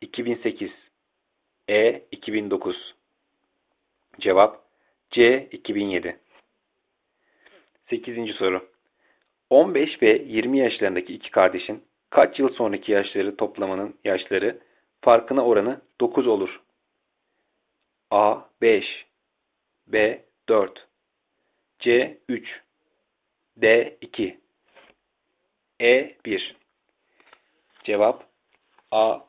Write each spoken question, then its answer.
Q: 15 ve 20 yaşlarındaki iki kardeşin kaç yıl sonraki yaşları toplamanın yaşları farkına oranı 9 olur?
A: Cevap A.